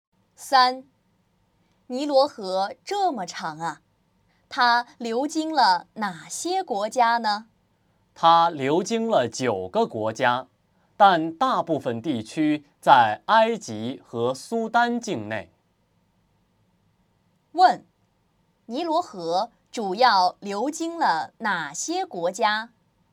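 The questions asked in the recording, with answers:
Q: 尼罗河主要流经了哪些国家?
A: 埃及和苏丹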